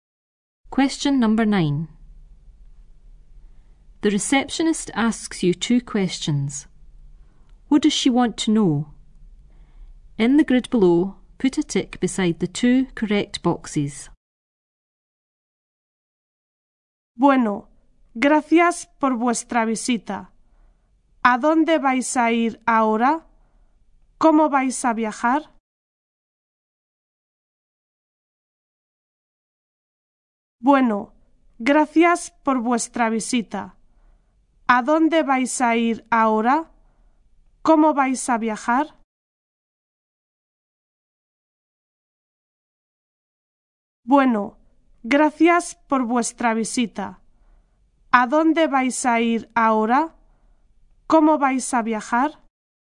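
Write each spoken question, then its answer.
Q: What does she want to know?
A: Where you are going next and how you are going to travel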